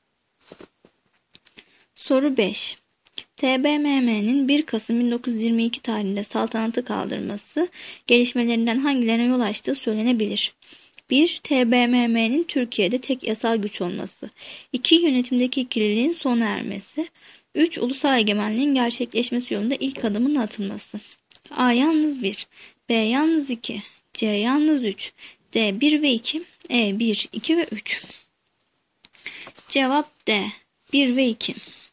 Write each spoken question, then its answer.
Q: TBMM'nin 1 Kasım 1922 tarihinde saltanatı kaldırması gelişmelerinden hangilerine yol açtığı söylenebilir?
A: Cevap D. 1 ve 2.